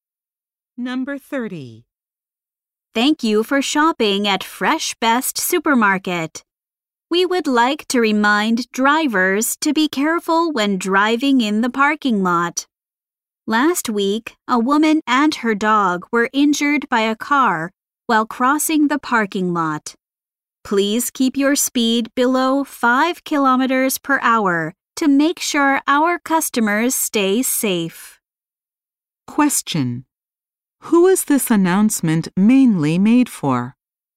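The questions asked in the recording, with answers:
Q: Who is this announcement mainly made for?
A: Drivers in the parking lot.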